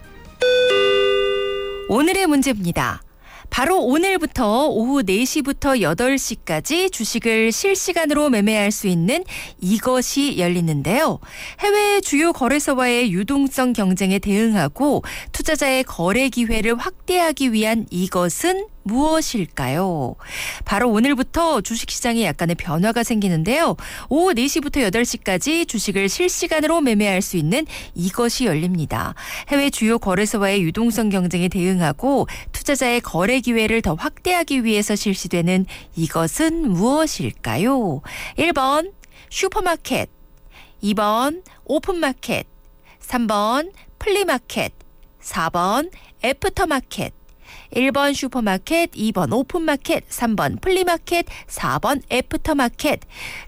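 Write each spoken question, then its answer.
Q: 해외 주요 거래소와의 유동성 경쟁에 대응하고 투자자의 거래 기회를 더 확대하기 위해서 실시되는 이것은 무엇일까요?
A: 4: 애프터마켓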